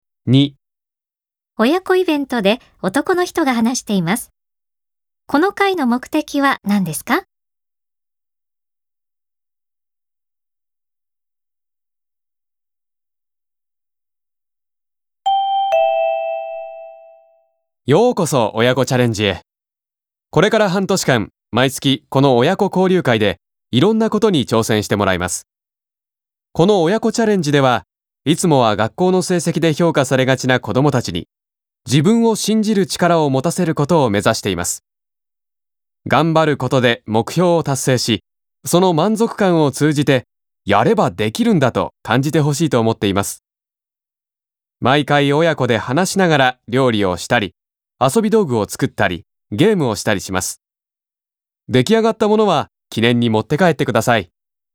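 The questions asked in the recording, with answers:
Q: この会の目的は何ですか?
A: 子どもたちに自分を信じる力を持たせること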